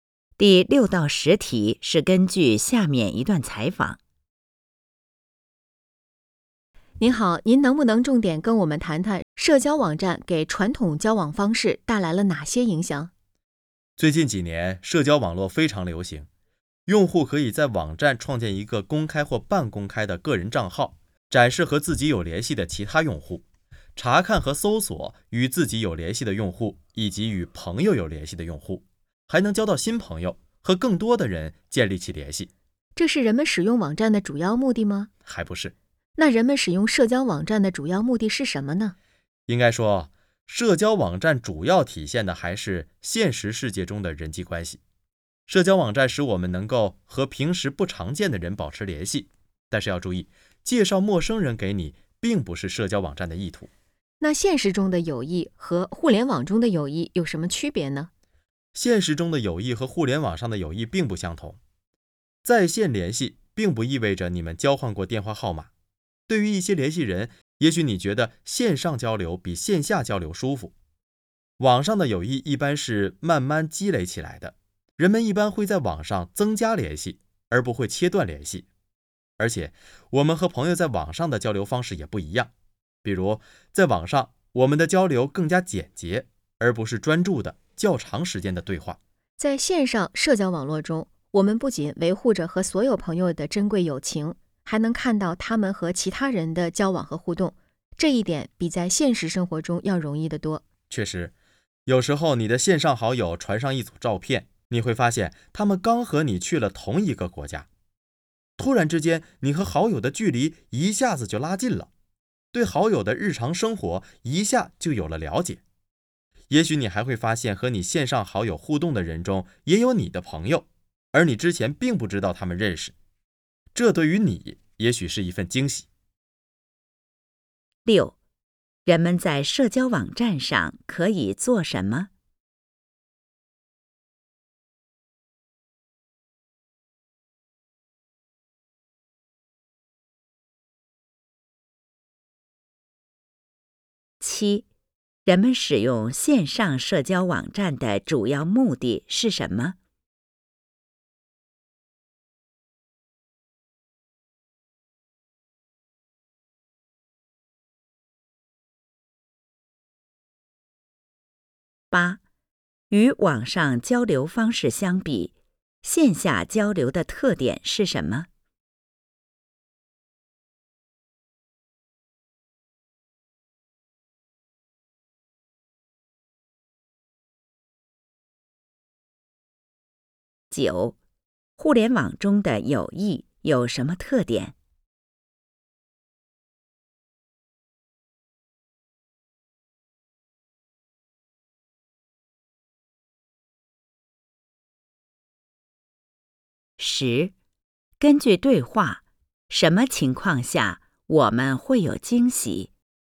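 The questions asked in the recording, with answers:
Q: 人们在社交网站上可以做什么?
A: 创建个人账号,查看和搜索有联系的用户,交新朋友

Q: 人们使用线上社交网站的主要目的是什么?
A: 维持现实世界中的人际关系,和平时不常见的人保持联系

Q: 与网上交流方式相比,线下交流的特点是什么?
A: 更专注、对话时间较长

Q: 互联网中的友谊有什么特点?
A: 一般是慢慢积累起来的

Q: 根据对话,什么情况下我们会有惊喜?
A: 发现和线上好友互动的人中也有自己的朋友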